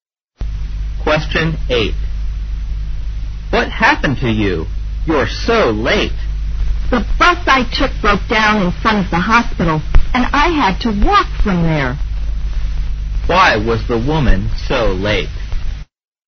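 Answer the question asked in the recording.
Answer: Her bus broke down and she had to walk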